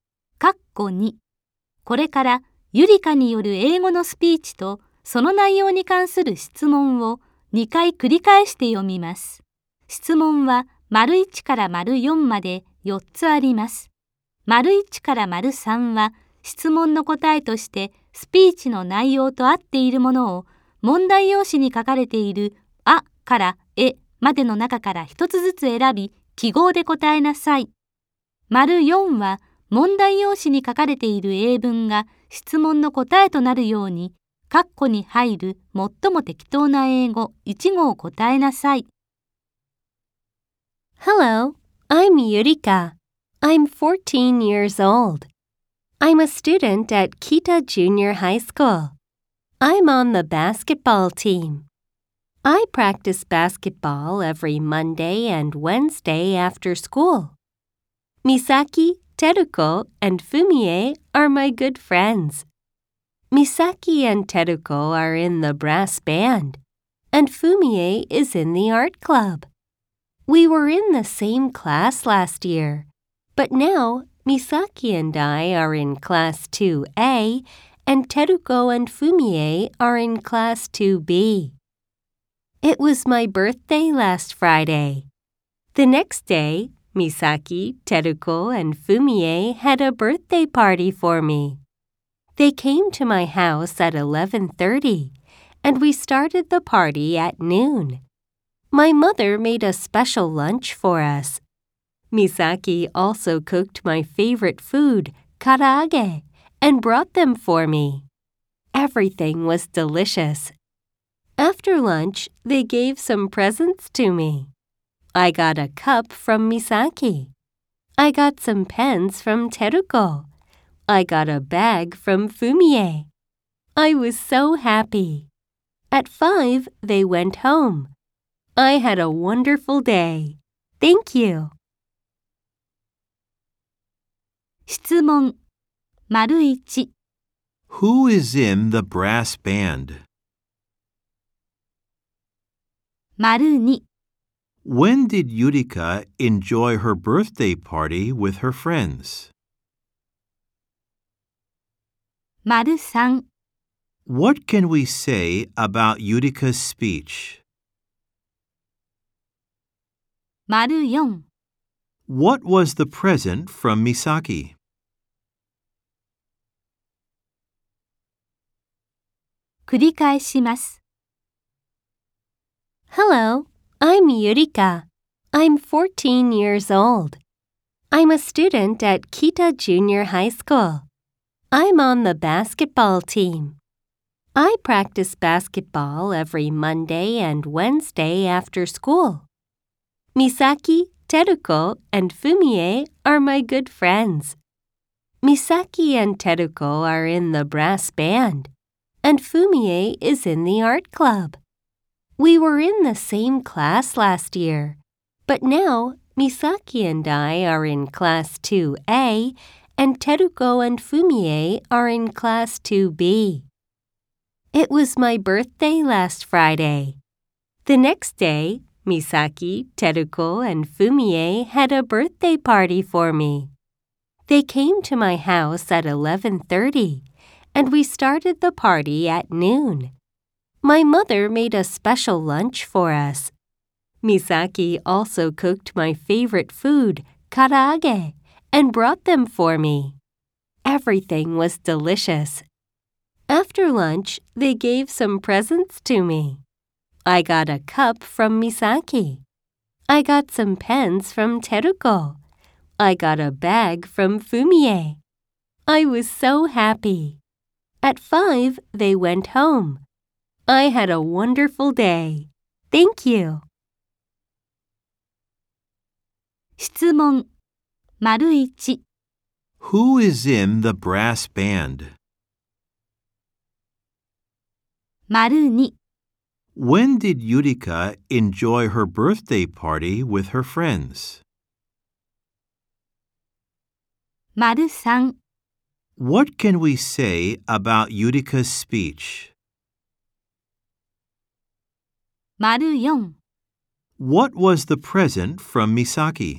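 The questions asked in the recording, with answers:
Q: Who is in the brass band?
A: Misaki and Teruko

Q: When did Yurika enjoy her birthday party with her friends?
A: Last Saturday (the day after her birthday), from noon

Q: What was the present from Misaki?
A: A cup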